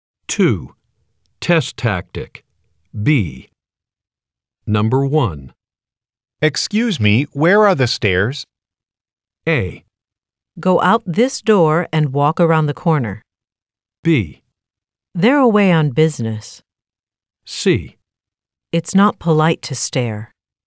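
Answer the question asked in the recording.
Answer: A: Go out this door and walk around the corner.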